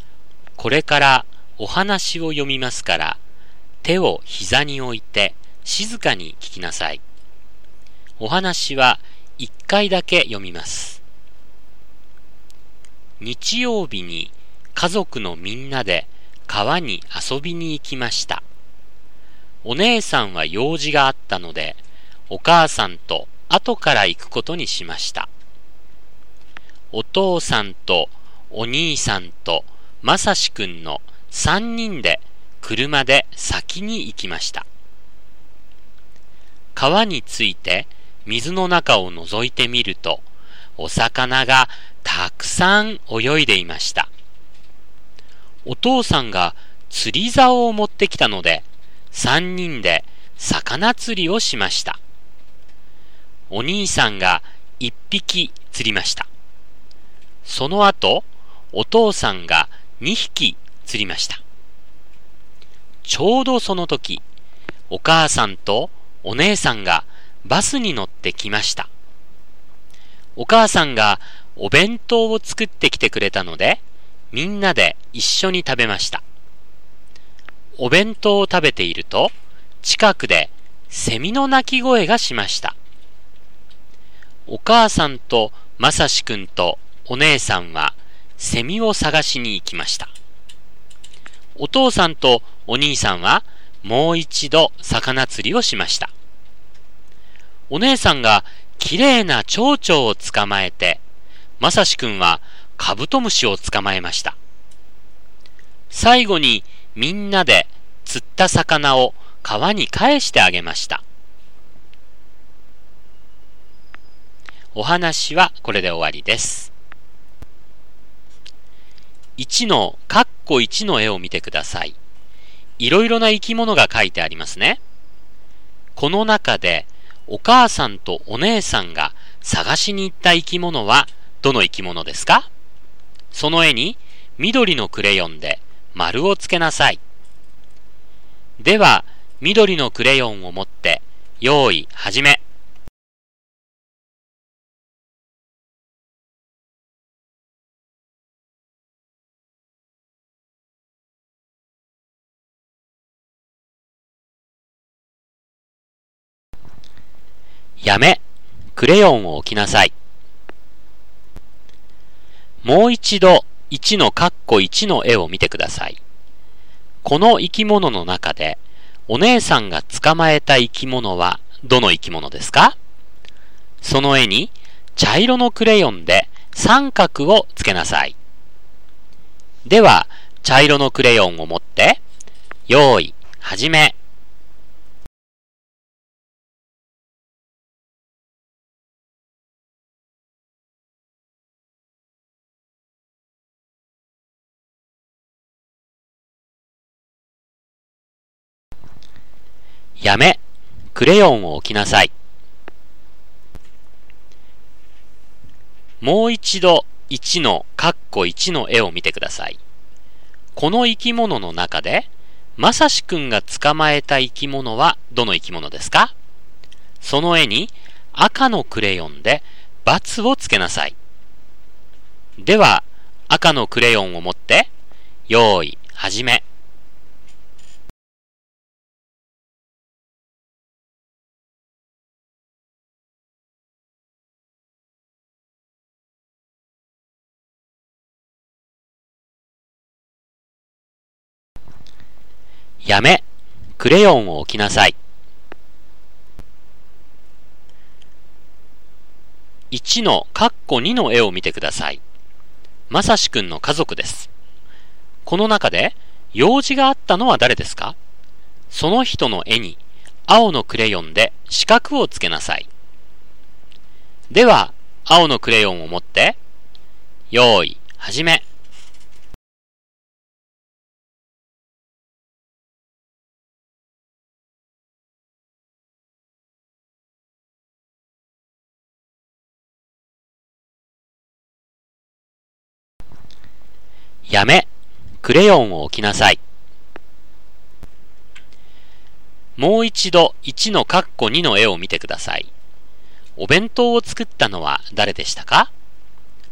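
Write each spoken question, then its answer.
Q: この中でお母さんとお姉さんが探しに行った生き物はどの生き物ですか?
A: セミ

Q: この生き物の中でお姉さんが捕まえた生き物はどの生き物ですか?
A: 蝶々

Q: この生き物の中でまさしくんが捕まえた生き物はどの生き物ですか?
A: カブトムシ

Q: この中で用事があったのは誰ですか?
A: お姉さん

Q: お弁当を作ったのは誰でしたか?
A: お母さん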